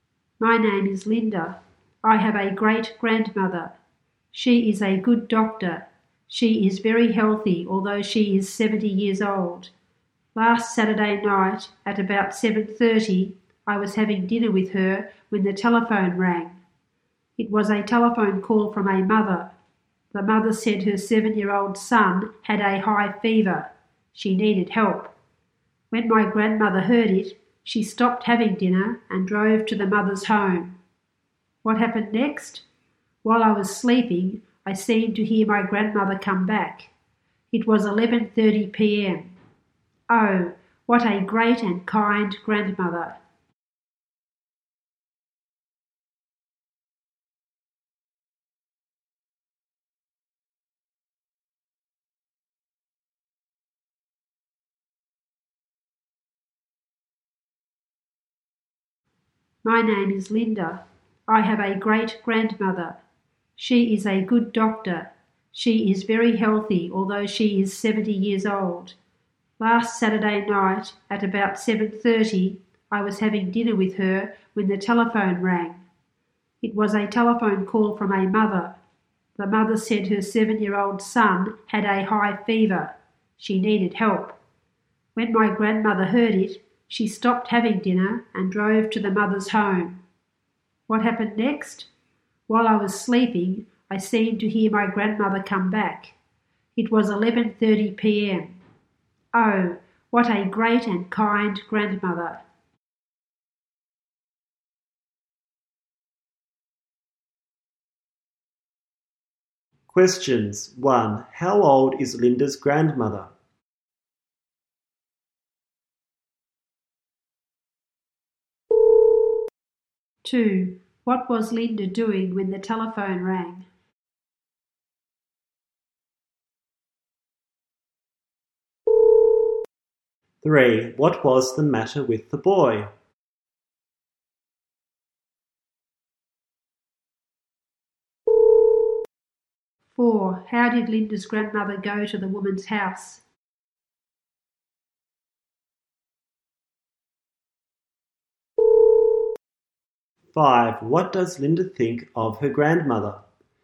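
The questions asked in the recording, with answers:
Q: How old is Linda's grandmother?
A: 70 years old

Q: What was Linda doing when the telephone rang?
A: Having dinner with her grandmother

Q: What was the matter with the boy?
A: He had a high fever

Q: How did Linda's grandmother go to the woman's house?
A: She drove

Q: What does Linda think of her grandmother?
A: Great and kind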